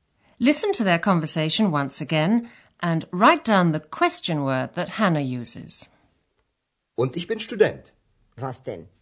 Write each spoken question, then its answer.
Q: write down the question word that Hannah uses.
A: The answer is what? Was.